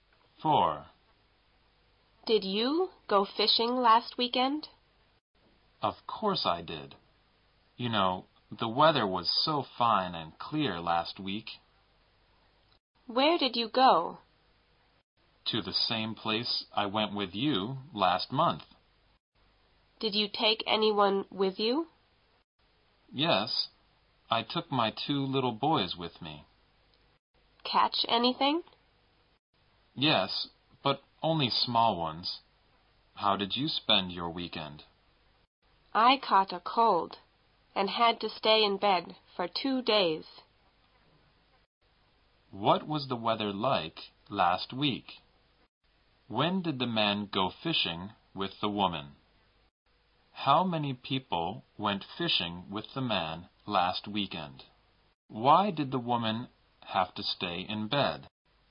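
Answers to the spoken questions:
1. Fine and clear
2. Last month
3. Two (his two little boys)
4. She caught a cold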